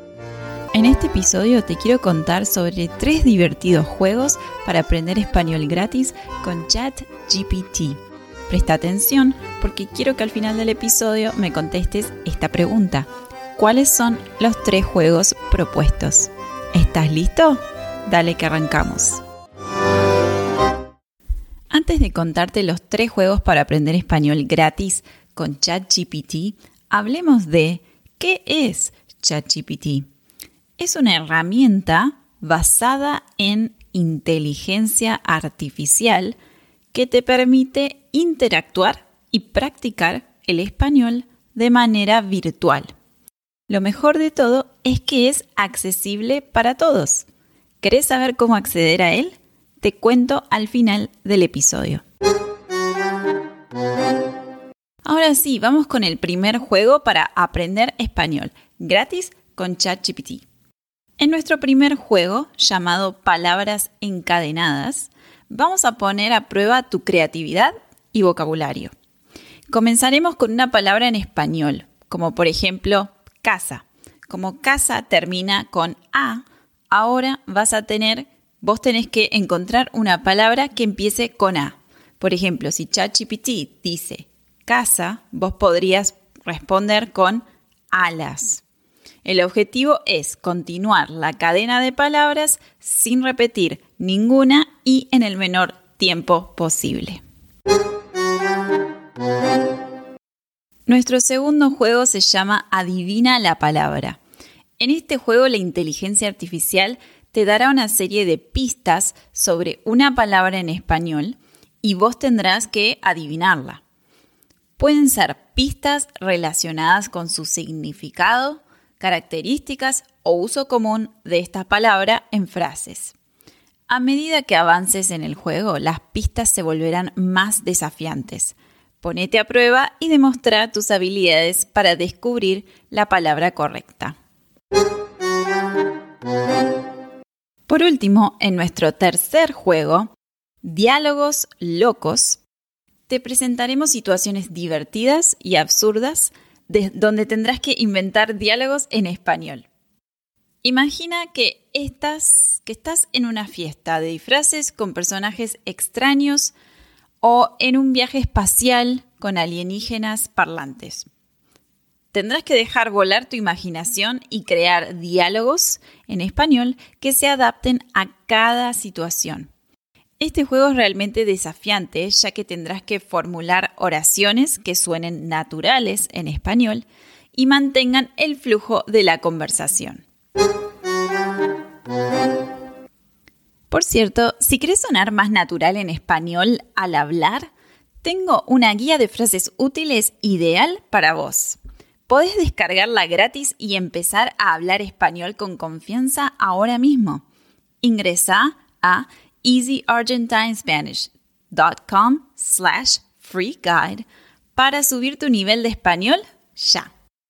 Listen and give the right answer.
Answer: En resumen, los tres juegos divertidos para aprender español gratis con ChatGPT son palabras encadenadas, adivina la palabra y diálogos locos.